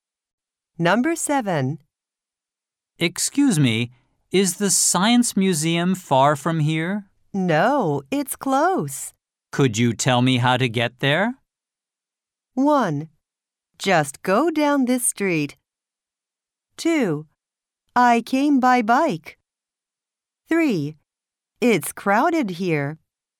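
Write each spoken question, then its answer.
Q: Could you tell me how to get there?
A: 1: Just go down this street.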